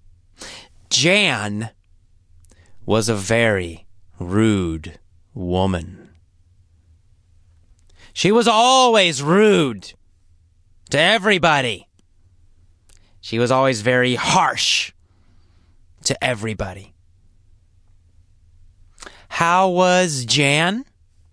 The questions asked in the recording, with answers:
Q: How was Jan?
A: Jan was rude. Jan was rude and harsh to everyone.